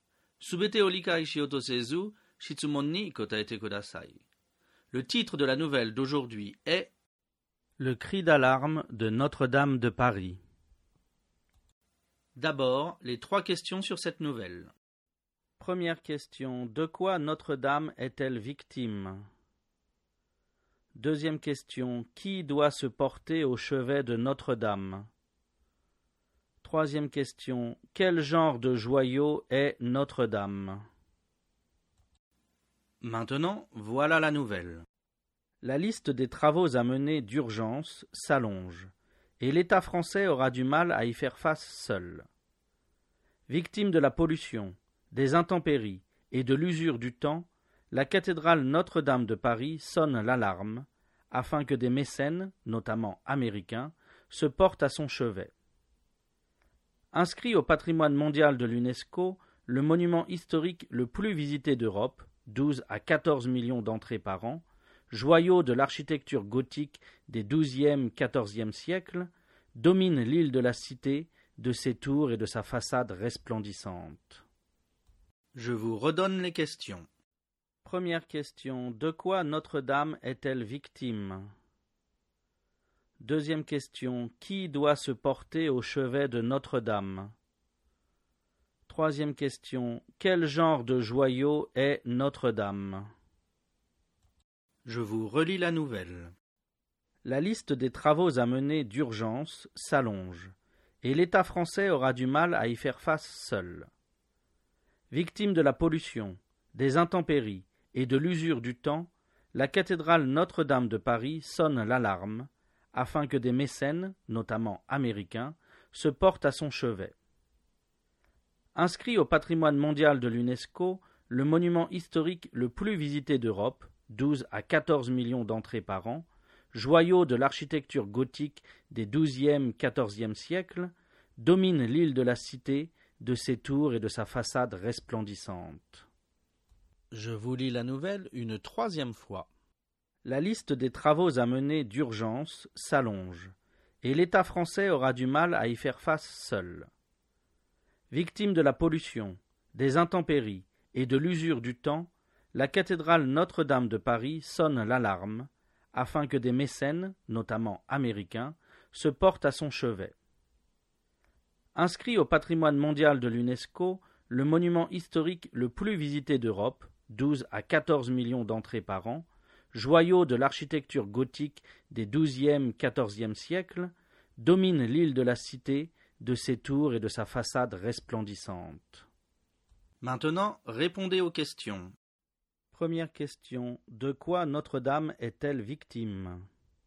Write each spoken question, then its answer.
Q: Première question, de quoi Notre-Dame est-elle victime?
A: Réponse. Notre-Dame est victime de la pollution, des intempéries et de l'usure du temps.

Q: Deuxième question, qui doit se porter au chevet de Notre-Dame?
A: Réponse. Des mécènes doivent se porter au chevet de Notre-Dame.

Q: Troisième question, quel genre de joyau est Notre-Dame?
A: Réponse. Notre-Dame est un joyau de l'architecture gothique des 12e-14e siècles.